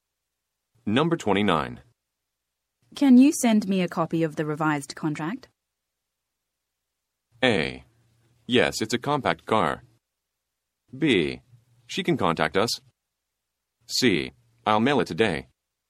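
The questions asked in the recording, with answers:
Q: Can you send me a copy of the revised contract?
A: C: I'll mail it today.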